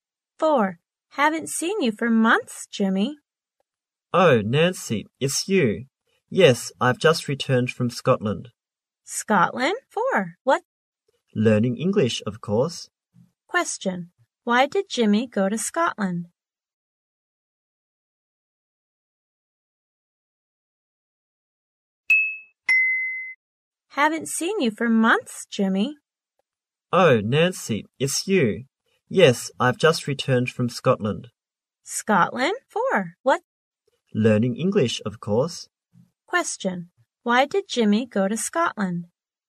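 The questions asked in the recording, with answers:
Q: Why did Jimmy go to Scotland?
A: To learn English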